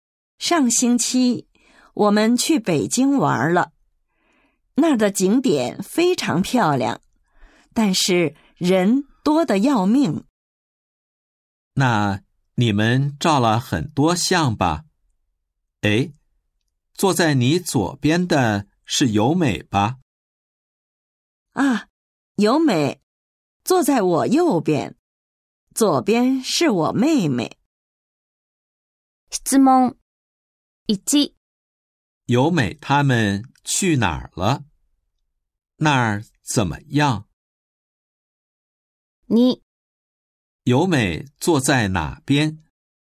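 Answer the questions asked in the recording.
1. 去北京了,景点很漂亮,但是人非常多
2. 右边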